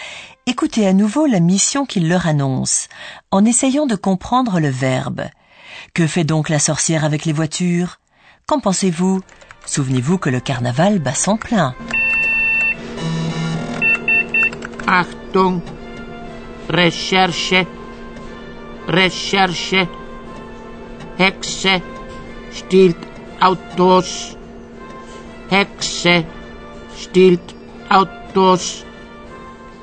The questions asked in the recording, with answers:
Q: Que fait donc la sorcière avec les voitures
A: La sorcière se sert de son déguisement de carnaval pour voler des voitures.